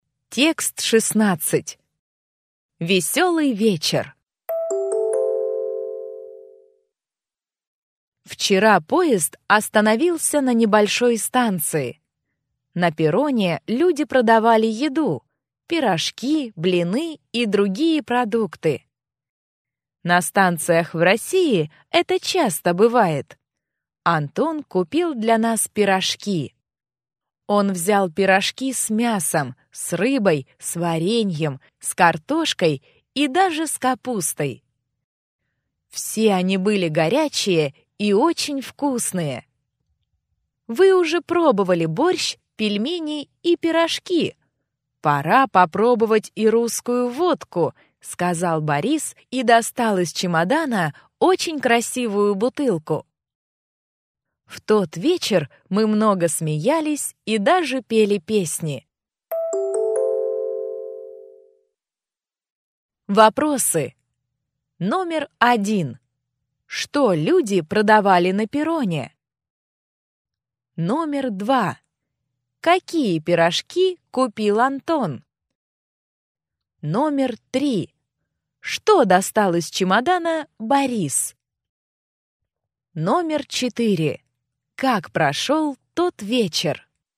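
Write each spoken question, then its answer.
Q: Что люди продавали на перроне?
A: Еду: пирожки, блины и другие продукты

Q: Какие пирожки купил Антон?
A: С мясом, с рыбой, с вареньем, с картошкой и с капустой

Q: Что достал из чемодана Борис?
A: Красивую бутылку русской водки

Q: Как прошел тот вечер?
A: Весело: много смеялись и пели песни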